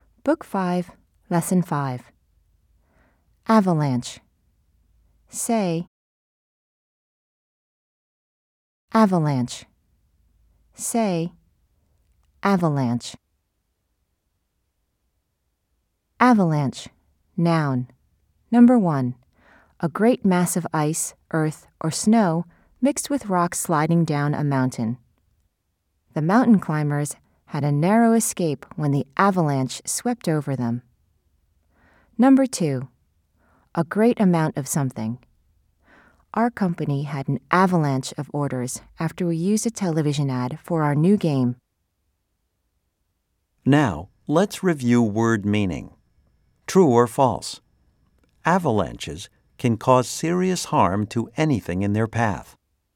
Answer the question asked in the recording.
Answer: If you said true, you are right.